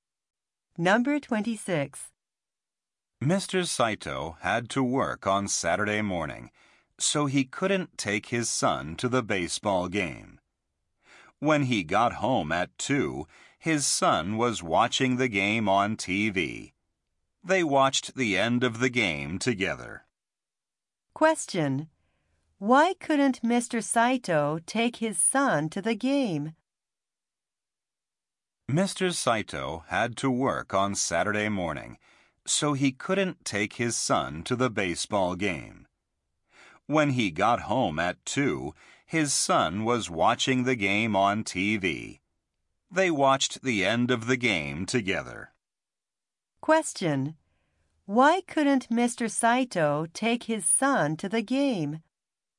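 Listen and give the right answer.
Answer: He had to work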